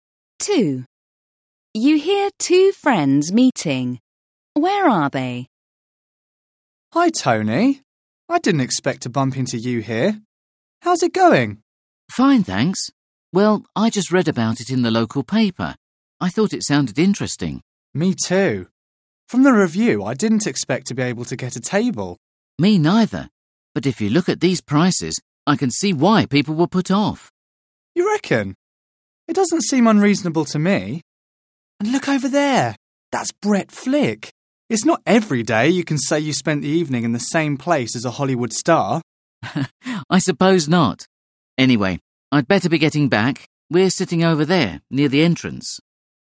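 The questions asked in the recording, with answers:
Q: Where are they?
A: In a restaurant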